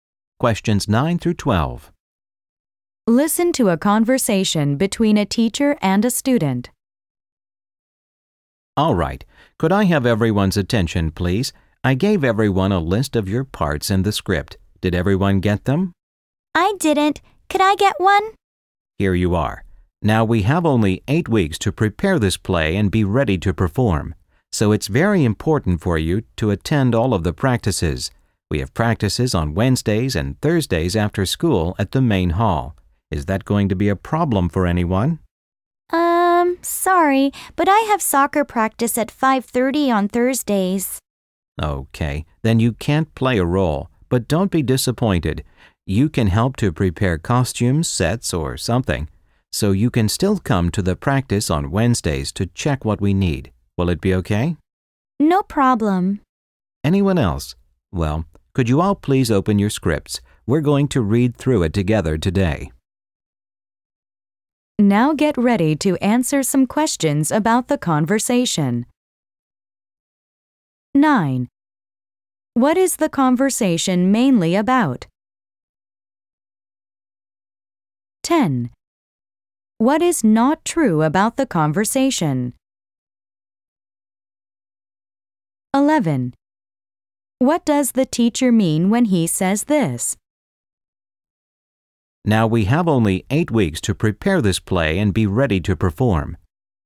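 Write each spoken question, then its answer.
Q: What is the conversation mainly about?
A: Getting ready for the school play and its practice schedule

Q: What does the teacher mean when he says this?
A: There is little time, so everyone must attend all the practices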